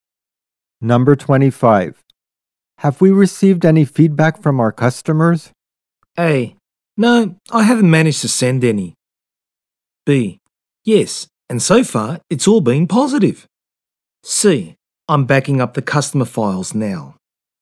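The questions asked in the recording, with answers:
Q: Have we received any feedback from our customers?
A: B: Yes, and so far it's all been positive.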